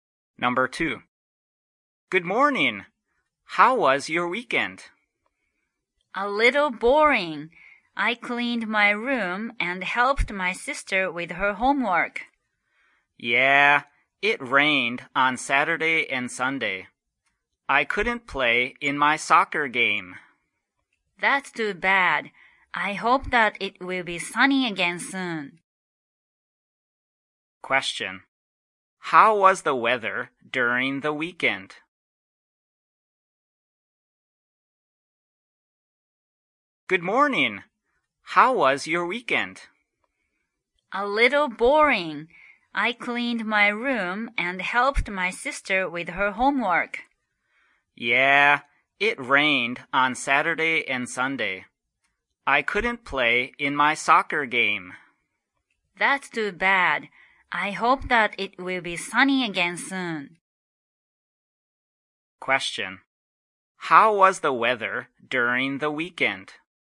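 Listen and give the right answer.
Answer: It was rainy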